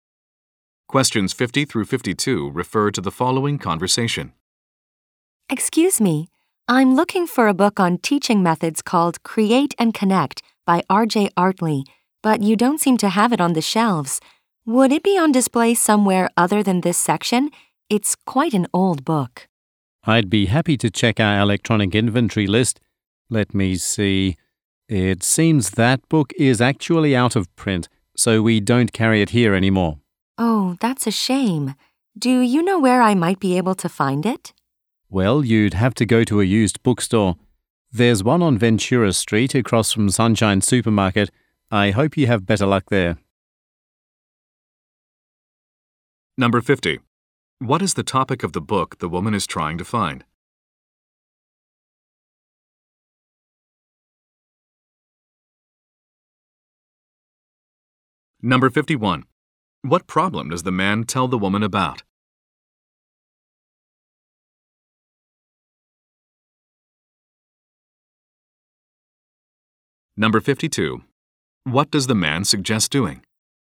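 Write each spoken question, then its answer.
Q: What is the topic of the book the woman is trying to find?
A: Teaching methods

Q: What problem does the man tell the woman about?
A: The book is out of print

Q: What does the man suggest doing?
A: Going to a used bookstore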